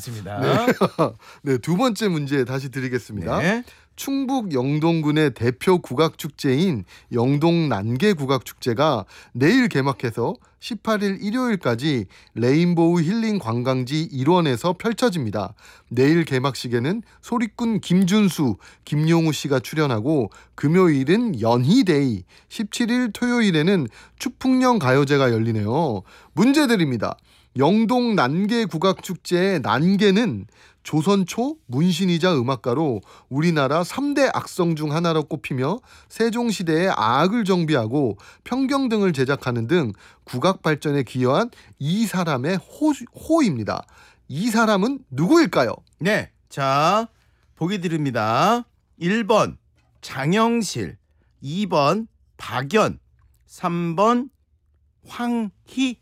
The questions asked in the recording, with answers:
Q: 이 사람은 누구일까요?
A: 2번 박연.